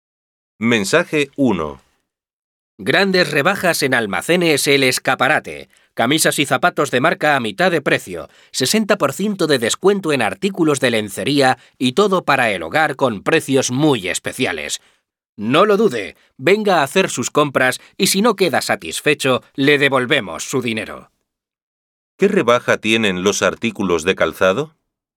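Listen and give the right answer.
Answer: 50% (a mitad de precio)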